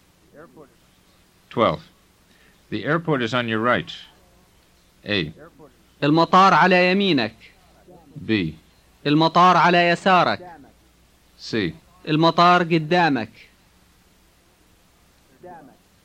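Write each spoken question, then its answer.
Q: The airport is on your right.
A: A: المطار على يمينك.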